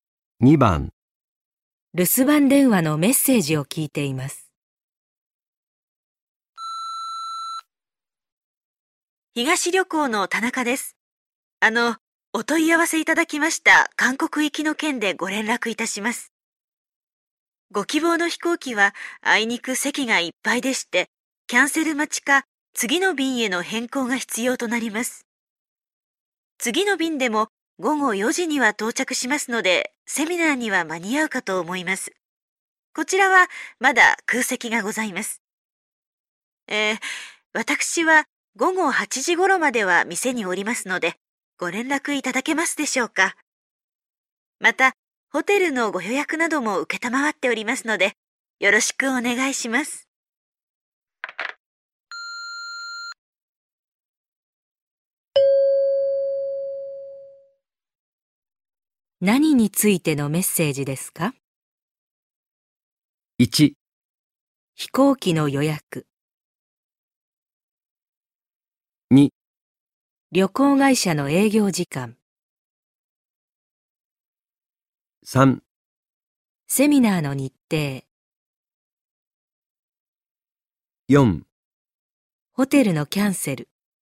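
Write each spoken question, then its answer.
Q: 何についてのメッセージですか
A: 1: 飛行機の予約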